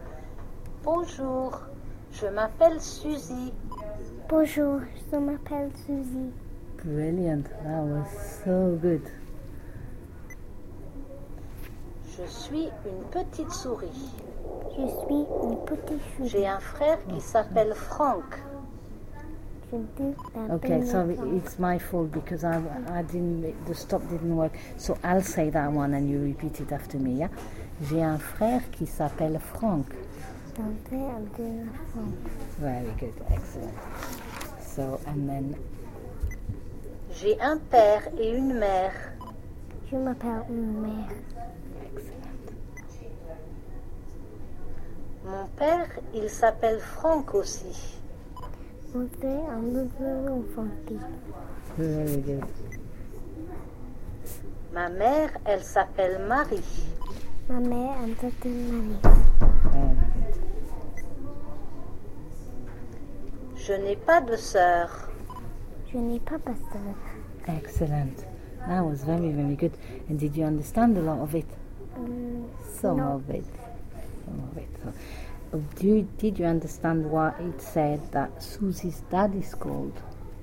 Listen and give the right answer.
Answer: It said, mon père, il s'appelle Franck aussi.